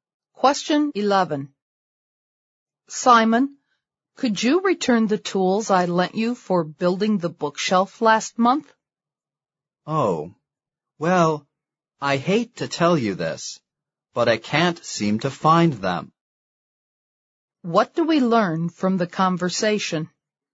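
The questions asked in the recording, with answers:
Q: What do we learn from the conversation?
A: Simon can't find the tools he borrowed; he seems to have lost them.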